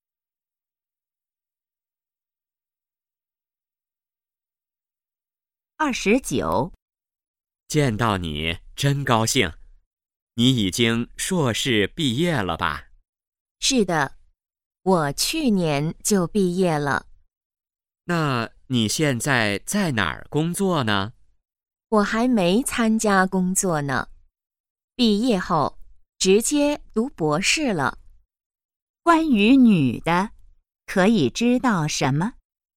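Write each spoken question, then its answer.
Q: 关于女的,可以知道什么?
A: 在读博士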